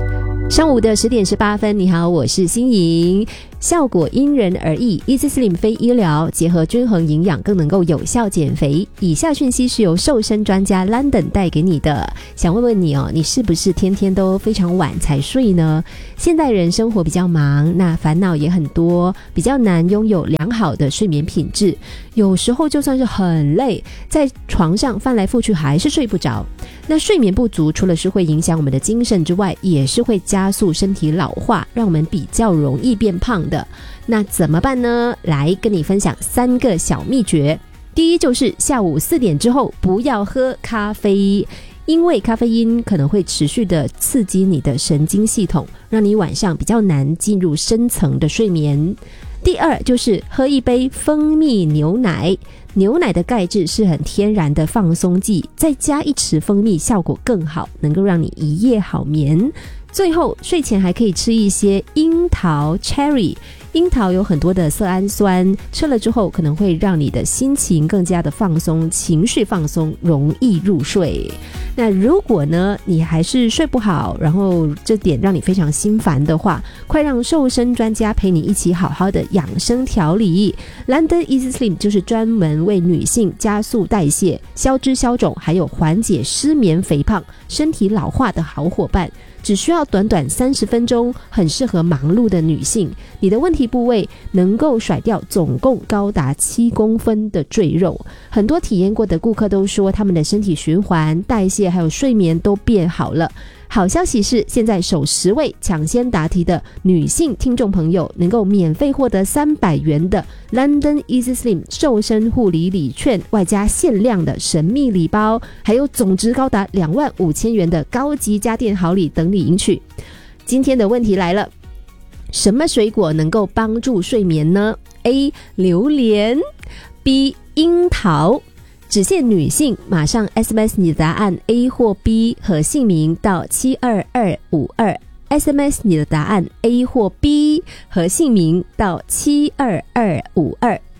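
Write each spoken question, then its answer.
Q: 什么水果能够帮助睡眠呢? A. 榴莲, B. 樱桃。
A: B: 樱桃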